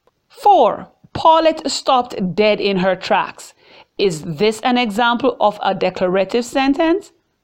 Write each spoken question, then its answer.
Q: Is this an example of a declarative sentence?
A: Yes, it is.